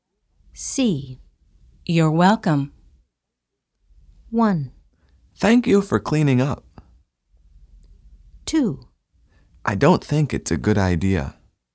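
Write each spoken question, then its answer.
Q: You're welcome.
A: 1: Thank you for cleaning up.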